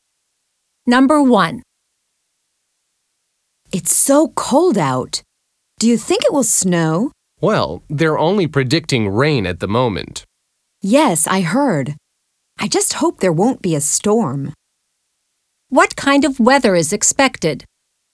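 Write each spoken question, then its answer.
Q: What kind of weather is expected?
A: rain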